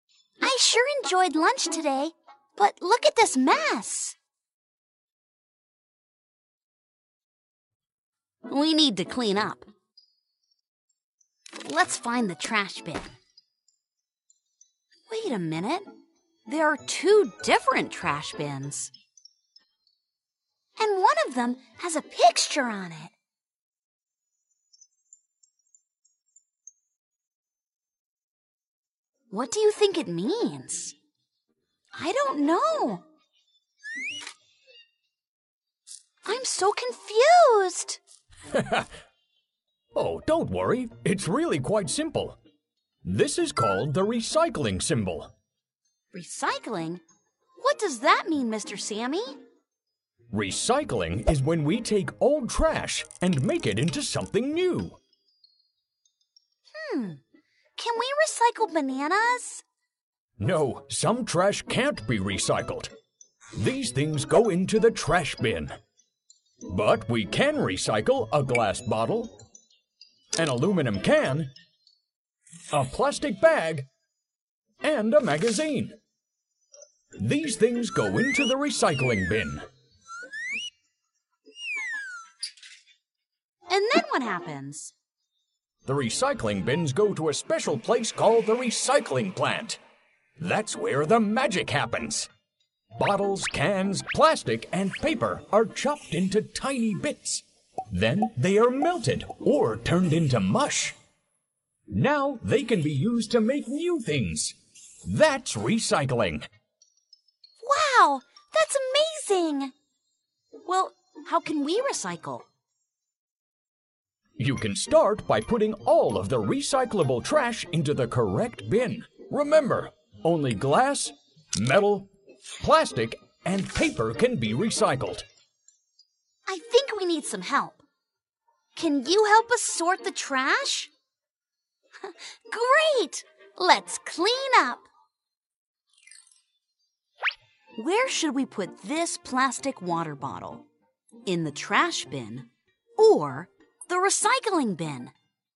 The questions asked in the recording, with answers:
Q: Where should we put this plastic water bottle? In the trash bin or the recycling bin?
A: You're right! Let's toss it in the recycling bin.